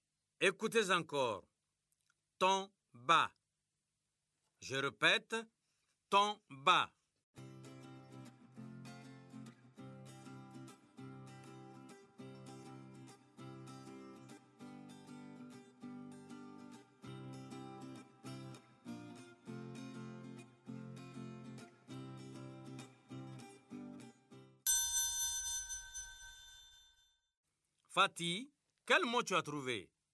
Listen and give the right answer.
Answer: Monsieur, c'est bâton.